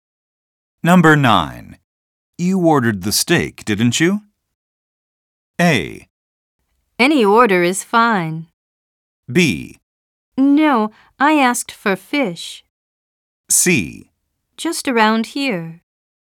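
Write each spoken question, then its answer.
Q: You ordered the steak, didn't you?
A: B: No, I asked for fish.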